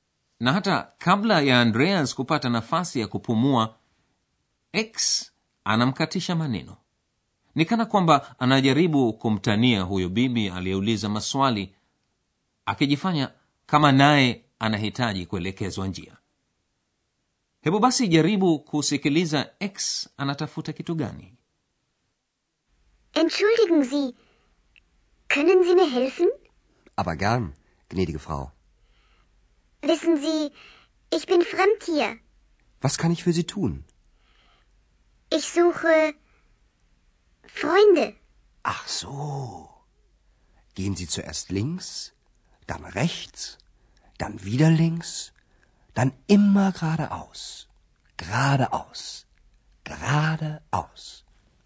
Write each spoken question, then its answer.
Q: hebu basi jaribu kusikiliza x anatafuta kitu gani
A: X anasema anatafuta marafiki